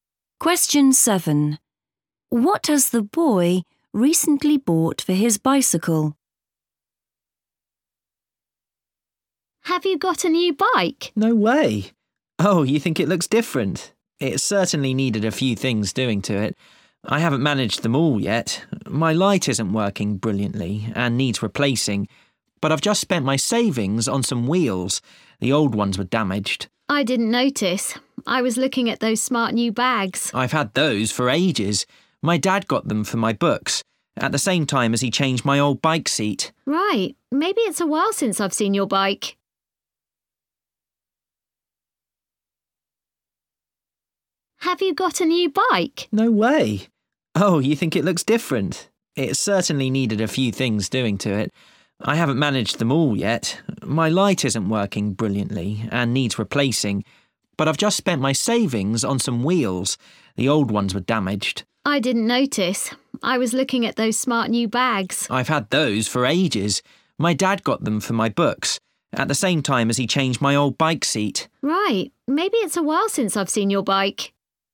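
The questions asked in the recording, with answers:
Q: What has the boy recently bought for his bicycle?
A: wheels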